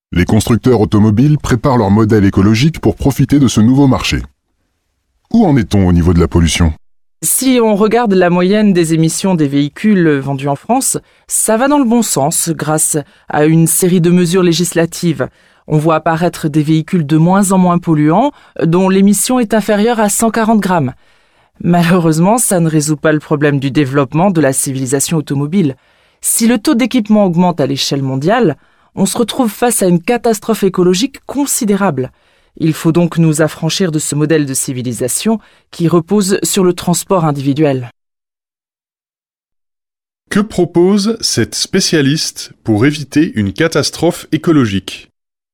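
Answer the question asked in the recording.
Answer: S'affranchir du modèle de civilisation reposant sur le transport individuel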